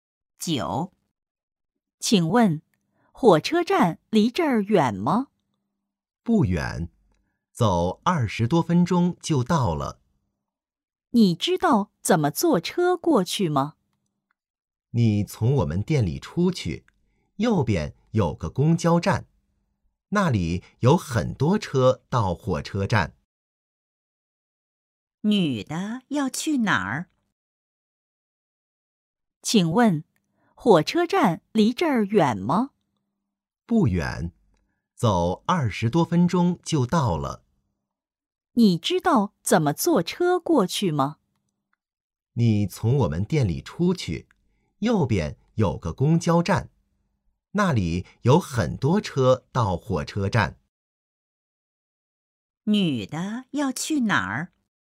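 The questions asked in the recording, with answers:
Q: 女的要去哪儿?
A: 火车站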